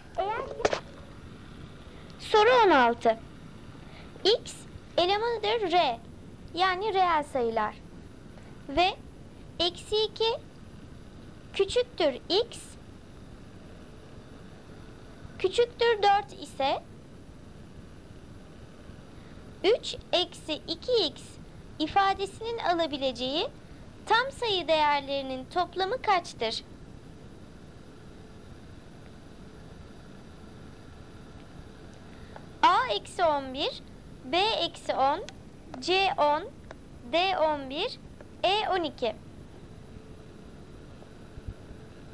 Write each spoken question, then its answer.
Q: 3 eksi 2X ifadesinin alabileceği tam sayı değerlerinin toplamı kaçtır?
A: Doğru cevap D 11.